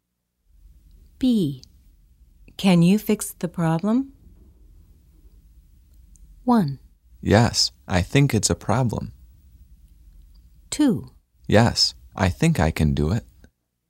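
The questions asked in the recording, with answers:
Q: Can you fix the problem?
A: 2: Yes, I think I can do it.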